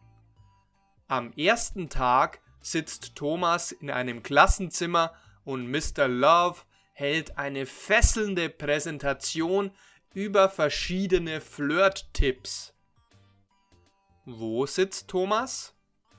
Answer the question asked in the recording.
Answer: In einem Klassenzimmer. Thomas sitzt in einem Klassenzimmer.